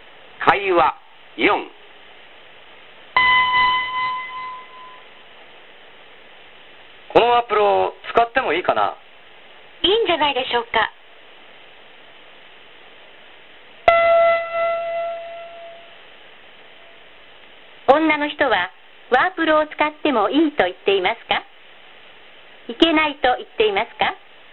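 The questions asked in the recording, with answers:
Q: 女の人はワープロを使ってもいいと言っていますかいけないと言っていますか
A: 使ってもいいと言っています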